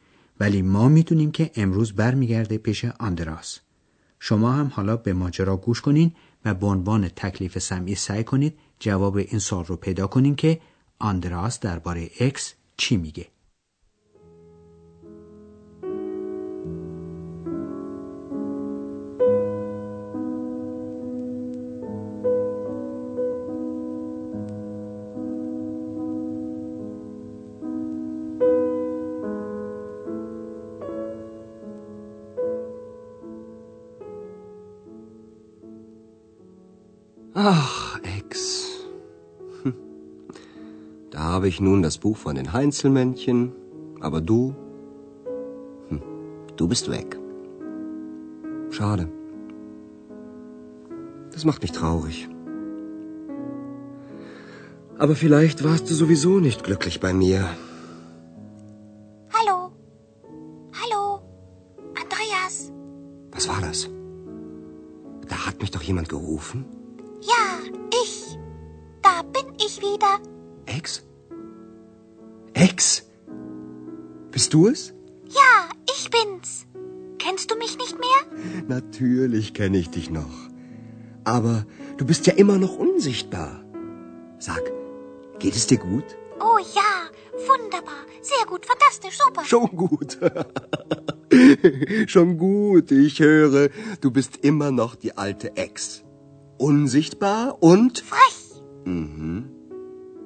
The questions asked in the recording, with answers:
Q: آندراس درباره اکس چی میگه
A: پس آندراس میبینه که اکس هنوز هم مثل سابقه